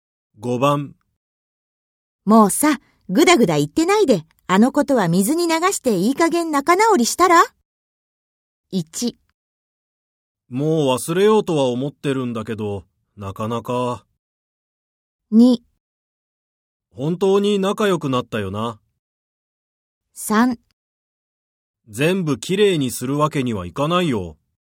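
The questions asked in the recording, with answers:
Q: もうさ、ぐだぐだ言ってないで、あのことは水に流していい加減仲直りしたら?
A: 1: もう忘れようとは思ってるんだけど、なかなか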